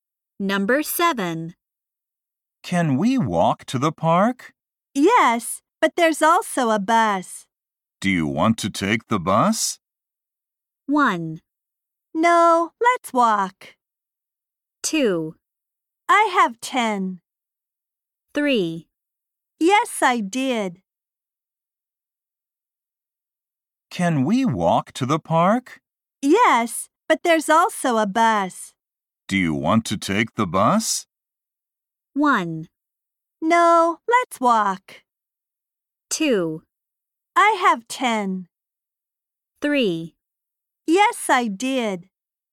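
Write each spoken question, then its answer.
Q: Do you want to take the bus?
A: 1: No, let's walk.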